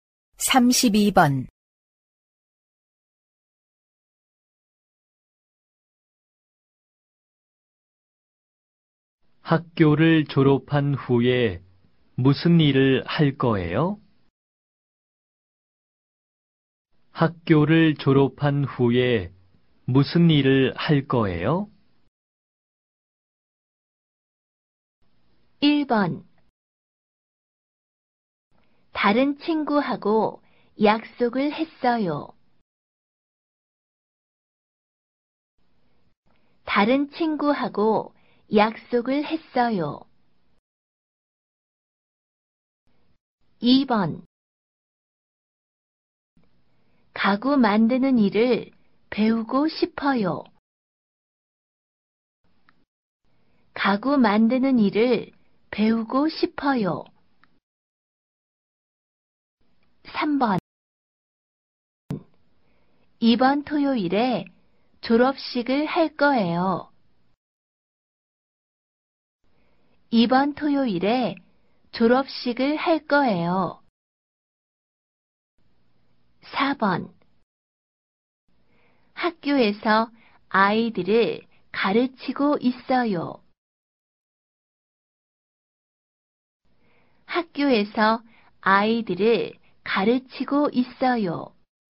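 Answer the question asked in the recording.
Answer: 2: 가구 만드는 일을 배우고 싶어요.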